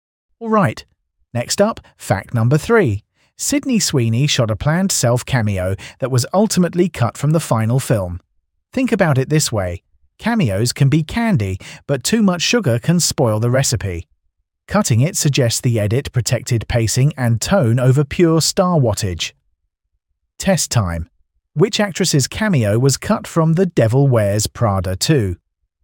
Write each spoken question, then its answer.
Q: Which actress's cameo was cut from The Devil Wears Prada 2?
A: Correct answer. Sydney Sweeney.